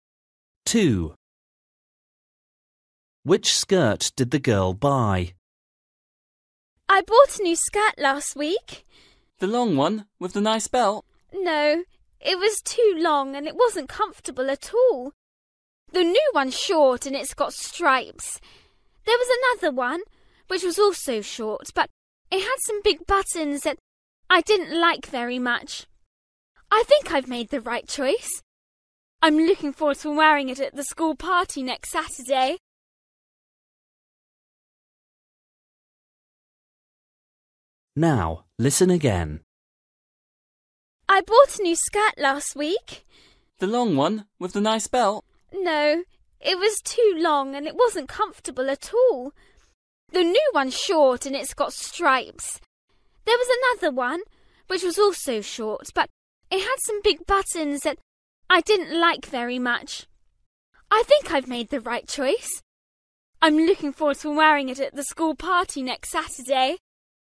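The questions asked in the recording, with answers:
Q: Which skirt did the girl buy?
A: the short striped one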